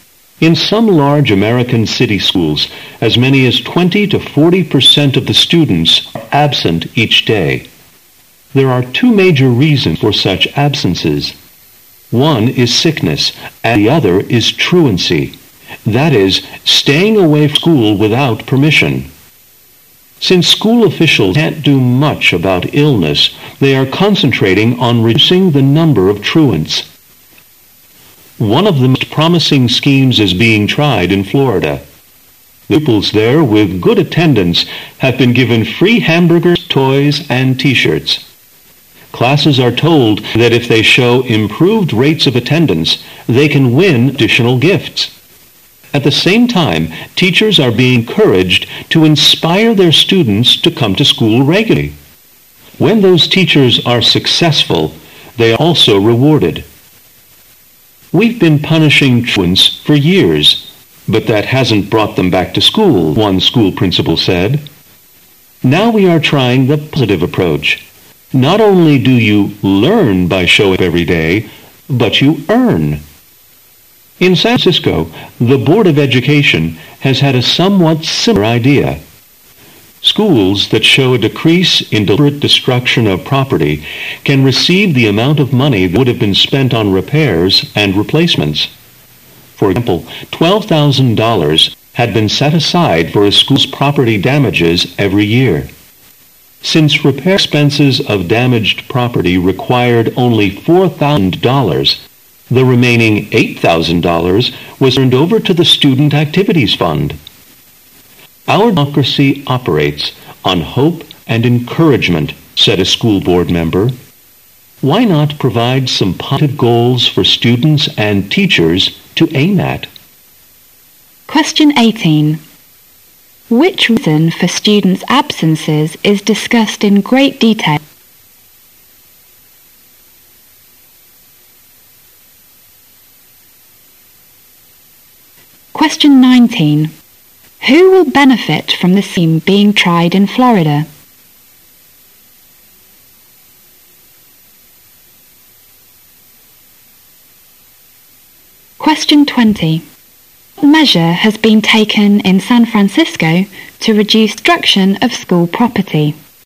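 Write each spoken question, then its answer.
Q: Which reason for students' absences is discussed in great detail?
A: Truancy

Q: Who will benefit from the scheme being tried in Florida?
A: Both students with good attendance and successful teachers

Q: What measure has been taken in San Francisco to reduce destruction of school property?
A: Schools that reduce property damage get the unspent repair money

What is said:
[解析] 18-20 In some large American city schools, as many as 20-40% of the students are absent each day. There are two major reasons for such absences: one is sickness, and the other is truancy, that is, staying away from school without permission. Since school officials can't do much about illness, [18]they are concentrating on reducing the number of truants. One of the most promising schemes has been tried in Florida. [19]The pupils there with good attendance have been given free hamburgers, toys and T-shirts. 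Classes are told that if they show improved rates of attendance, they can win additional gifts. At the same time, teachers are being encouraged to inspire their students to come to school regularly. When those teachers are successful, they are also rewarded. "We've been punishing truants for years, but that hasn't brought them back to school," one school principal said. "Now we are trying the positive approach. Not only do you learn by showing up every day, but you earn." In San Francisco, the beard of education has had a somewhat similar idea. [20]Schools that show a decrease in deliberate destruction of property can receive the amount of money that would've been spent on repairs and replacements. For example, 12000 dollars had been set aside for a school's property damages every year. Since repair expenses of damaged property required only 4,000 dollars, the remaining 8,000 dollars was turned over to the student activities fund. 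"Our democracy operates on hope and encouragement," said the school board member. "Why not provide some positive goals for students and teachers to aim at?" 18.Which reason for students' absences is discussed in great detail?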